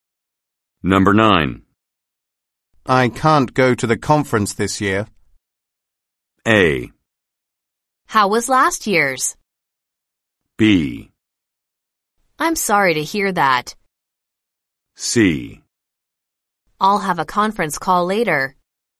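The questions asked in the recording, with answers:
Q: I can't go to the conference this year.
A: B: I'm sorry to hear that.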